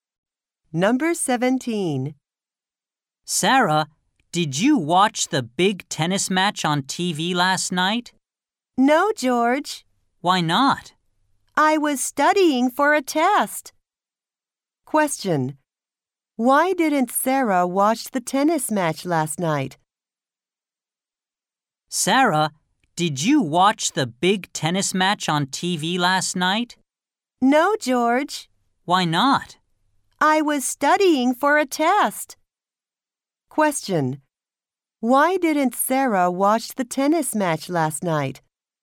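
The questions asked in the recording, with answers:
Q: Why didn't Sarah watch the tennis match last night?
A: She was studying for a test.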